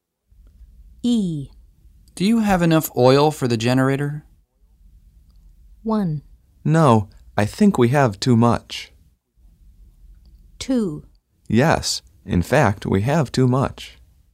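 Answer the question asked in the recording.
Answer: 2: Yes, in fact, we have too much.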